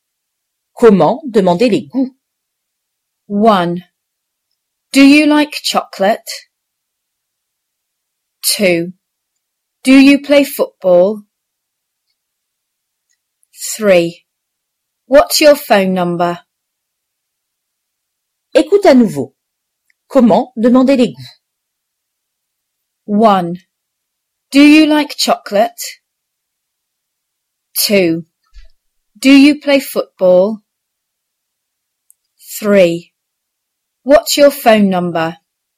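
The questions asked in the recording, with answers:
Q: Comment demander les goûts?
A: 1: Do you like chocolate?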